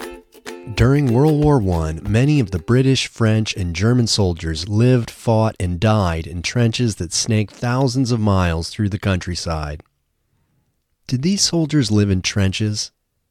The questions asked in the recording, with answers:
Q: Did these soldiers live in trenches?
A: Yes, these soldiers lived in trenches.